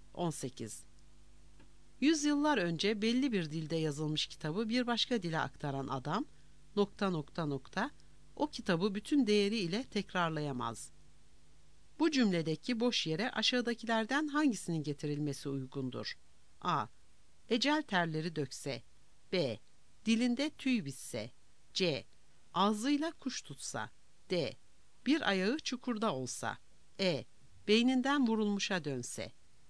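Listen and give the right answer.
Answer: C: Ağzıyla kuş tutsa.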